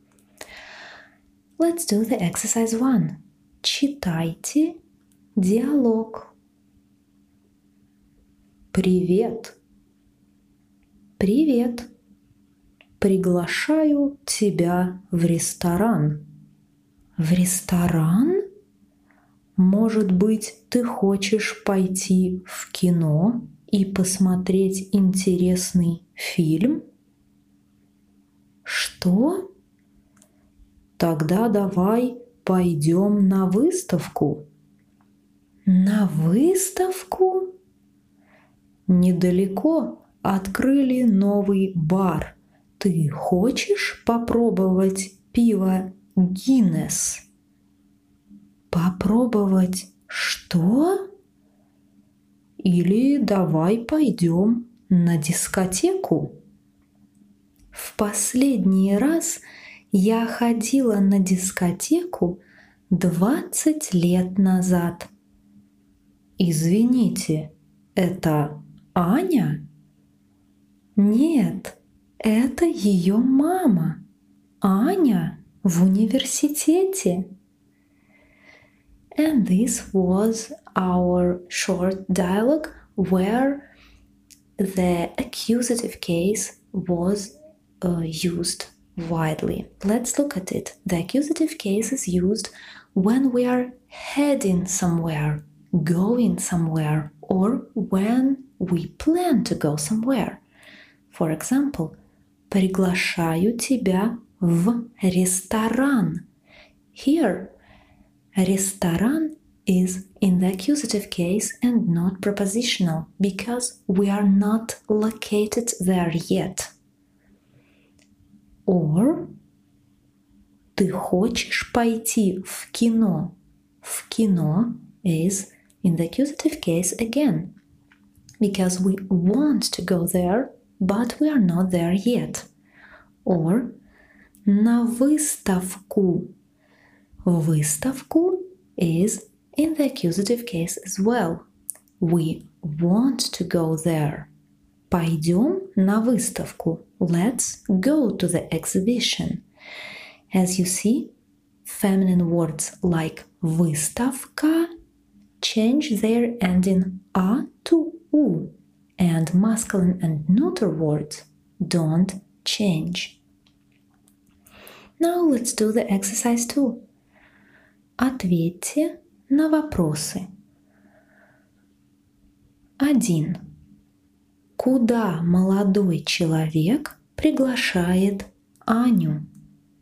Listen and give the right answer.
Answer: Молодой человек приглашает Аню в ресторан.